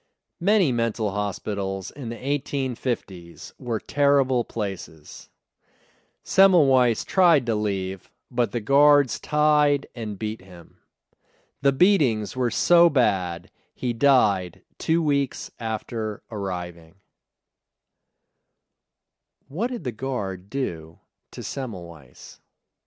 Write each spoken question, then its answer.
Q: What did the guard do to Semmelweis?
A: The guards tied and beat him.